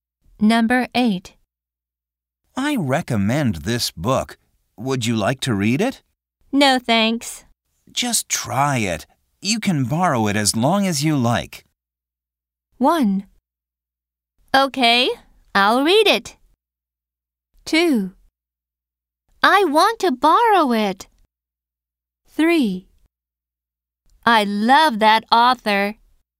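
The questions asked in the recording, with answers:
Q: Just try it. You can borrow it as long as you like.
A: 1: Okay, I'll read it.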